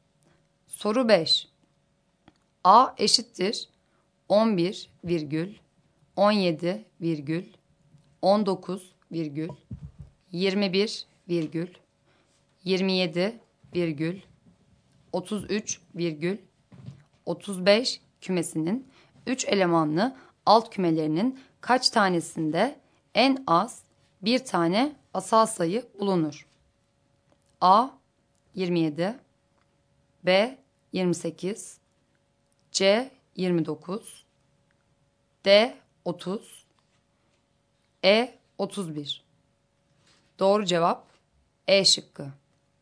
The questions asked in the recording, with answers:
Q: A eşittir 11 virgül 17 virgül 19 virgül 21 virgül 27 virgül 33 virgül 35 kümesinin 3 elemanlı alt kümelerinin kaç tanesinde en az bir tane asal sayı bulunur?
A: Doğru cevap E şıkkı.